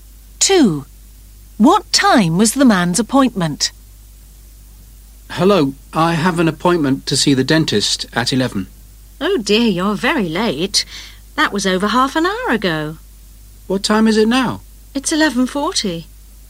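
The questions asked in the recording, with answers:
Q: What time was the man's appointment?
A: 11 o'clock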